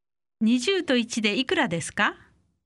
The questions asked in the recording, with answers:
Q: 20と1でいくらですか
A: 21